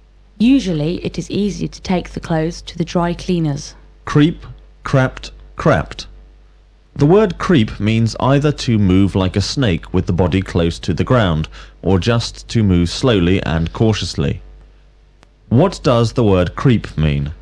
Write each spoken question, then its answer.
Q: What does the word creep mean?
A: The word creep means either to move like a snake with the body close to the ground, or just to move slowly and cautiously.